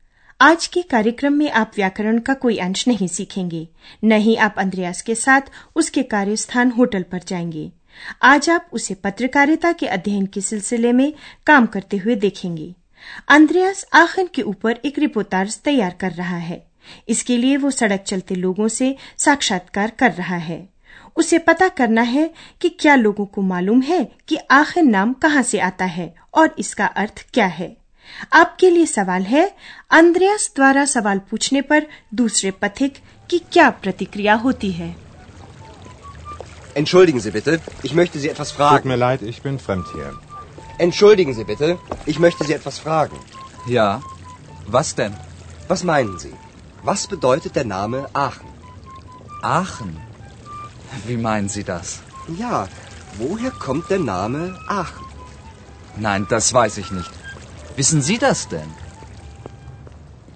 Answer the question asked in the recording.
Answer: दूसरे पथिक को पता नहीं है कि आखिर नाम कहाँ से आया है वो अंद्रयास से पूछता है कि क्या स्वयं उसे इसका पता है